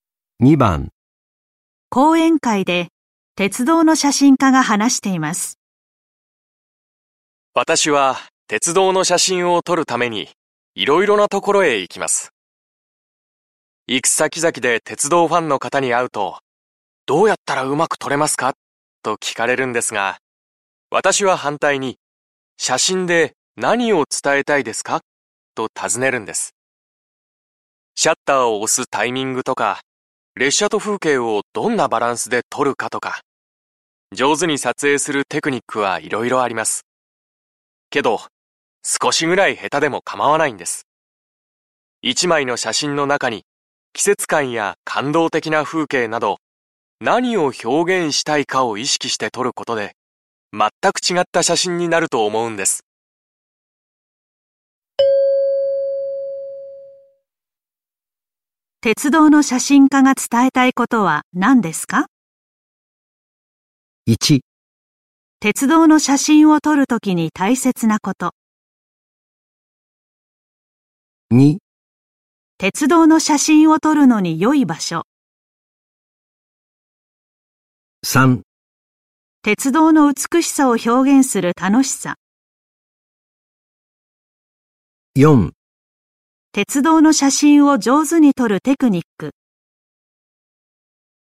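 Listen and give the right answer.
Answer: 1: 鉄道の写真を撮るときに大切なこと。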